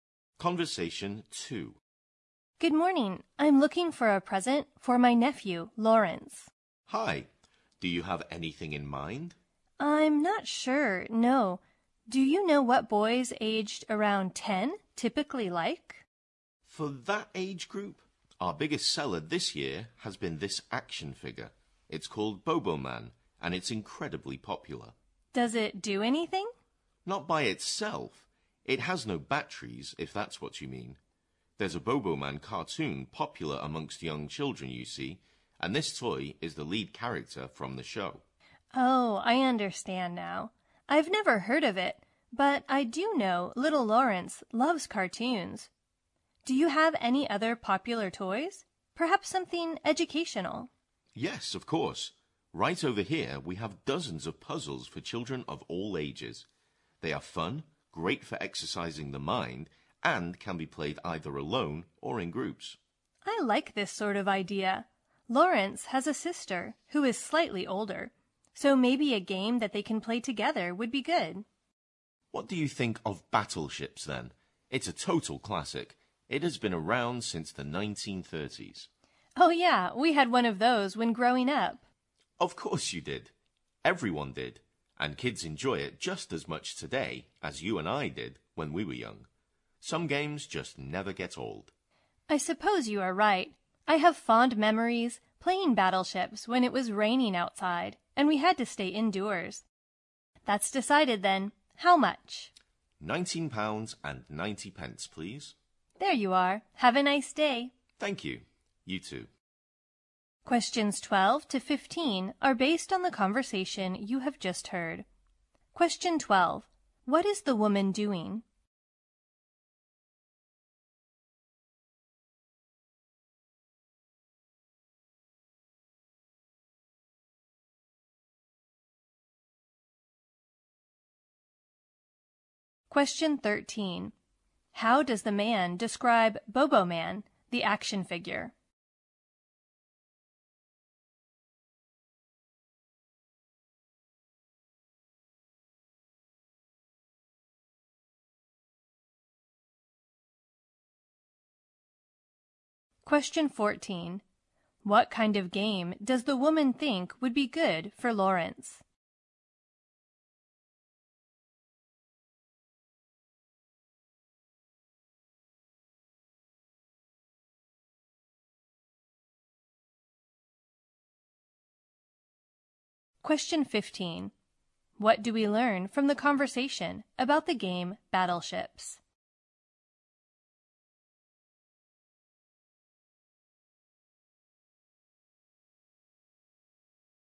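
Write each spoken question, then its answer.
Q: What is the woman doing?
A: Buying a present for her nephew

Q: How does the man describe Bobo Man, the action figure?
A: It is incredibly popular, the lead character of a cartoon

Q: What kind of game does the woman think would be good for Lawrence?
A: One he can play together with his sister

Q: What do we learn from the conversation about the game Battleships?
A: It is a classic that has been around since the 1930s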